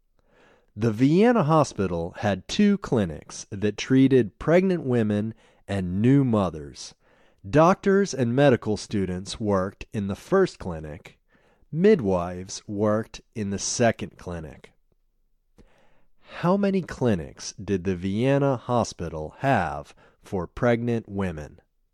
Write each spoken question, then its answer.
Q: How many clinics did the Vienna Hospital have for pregnant women?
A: The Vienna Hospital had two clinics for pregnant women.